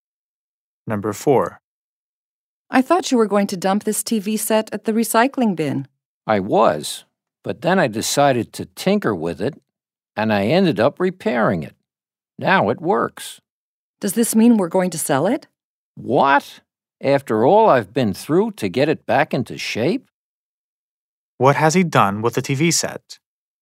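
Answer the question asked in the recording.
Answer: He repaired it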